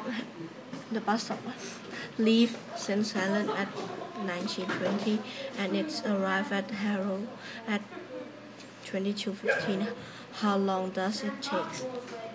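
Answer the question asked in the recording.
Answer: 2 hours 55 minutes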